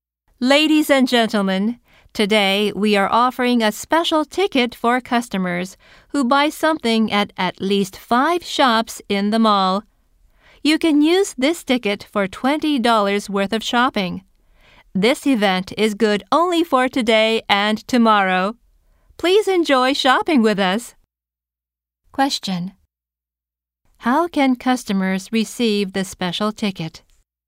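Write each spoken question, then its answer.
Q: How can customers receive the special ticket?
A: By buying something at at least 5 shops in the mall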